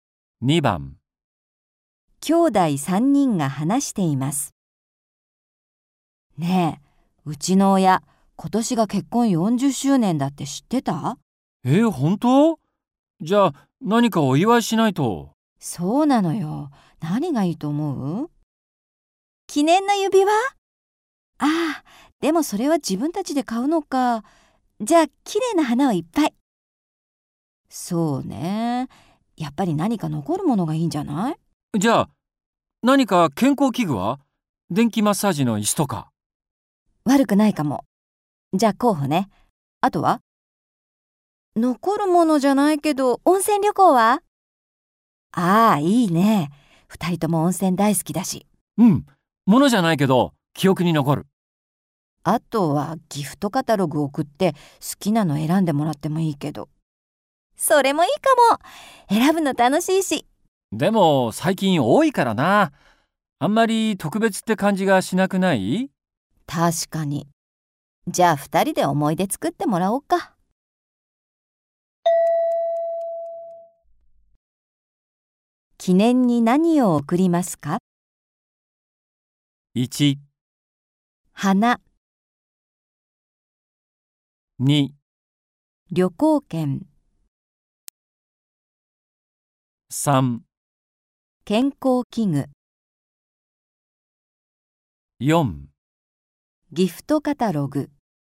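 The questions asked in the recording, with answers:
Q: 記念に何を贈りますか?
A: 2: 旅行券。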